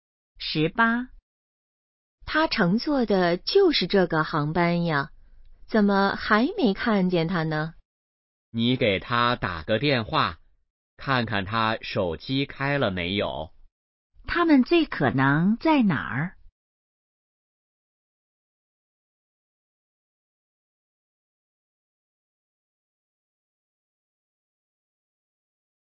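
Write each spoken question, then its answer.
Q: 他们最可能在哪儿?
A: 机场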